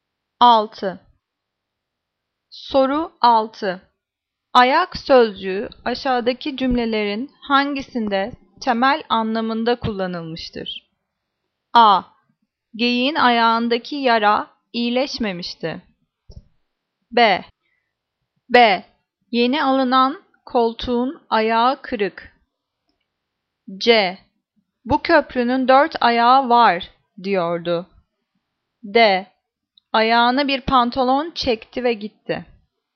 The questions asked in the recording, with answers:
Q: Ayak sözcüğü aşağıdaki cümlelerin hangisinde temel anlamında kullanılmıştır?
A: Cevap A. Geyiğin ayağındaki yara iyileşmemişti.